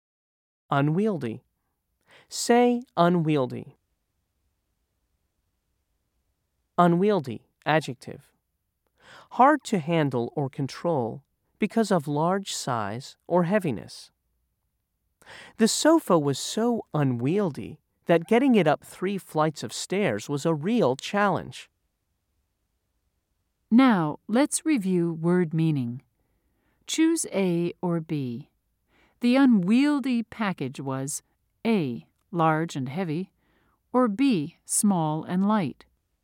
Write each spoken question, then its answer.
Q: Choose A or B. The unwieldy package was A, large and heavy, or B, small and light.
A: If you said A, you're correct.